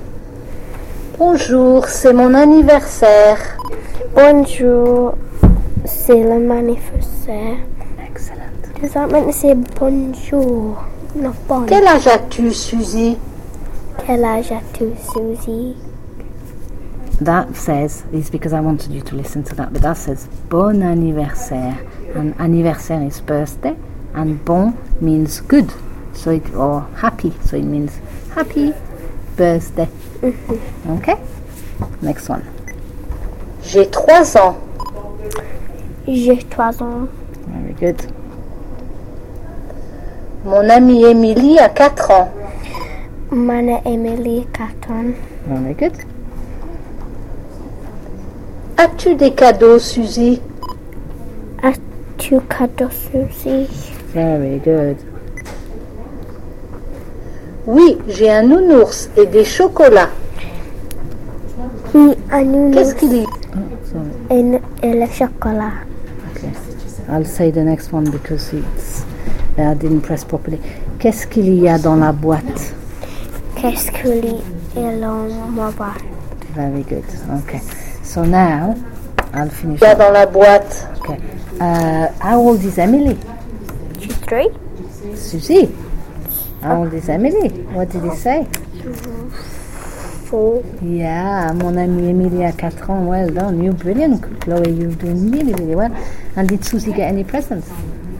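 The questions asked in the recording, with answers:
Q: And did Susie get any presents?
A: Yes, a teddy bear and chocolates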